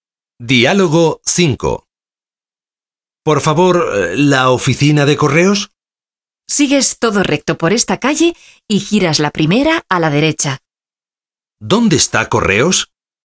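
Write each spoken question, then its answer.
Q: ¿Dónde está Correos?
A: Todo recto por esta calle y la primera a la derecha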